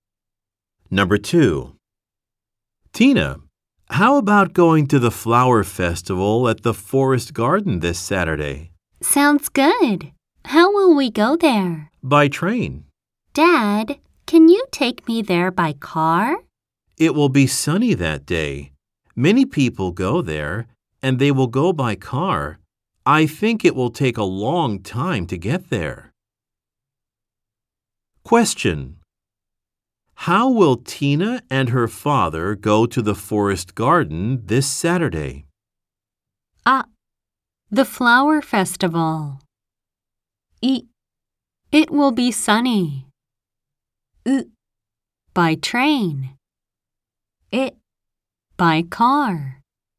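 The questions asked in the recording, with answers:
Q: How will Tina and her father go to the Forest Garden this Saturday?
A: う: By train.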